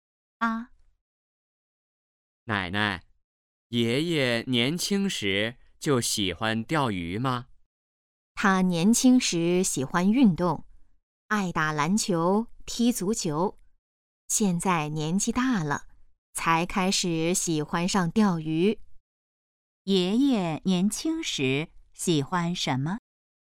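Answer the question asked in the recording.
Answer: 运动(打篮球、踢足球)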